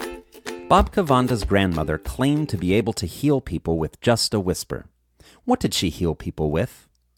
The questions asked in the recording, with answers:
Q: What did she heal people with?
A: She healed people with a whisper.